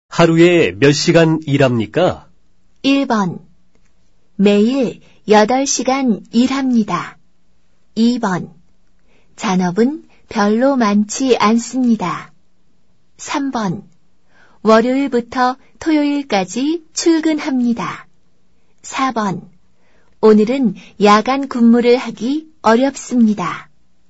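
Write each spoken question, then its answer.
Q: 하루에 몇 시간 일합니까?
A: 1: 매일 8시간 일합니다.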